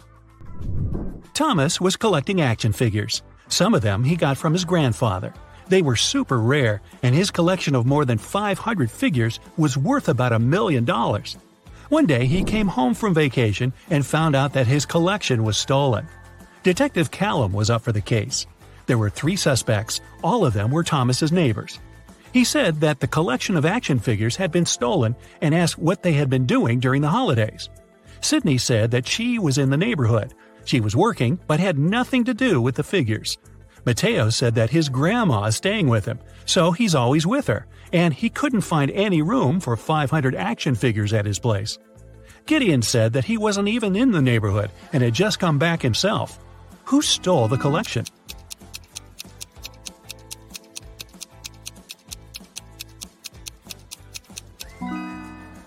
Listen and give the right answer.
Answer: Mateo.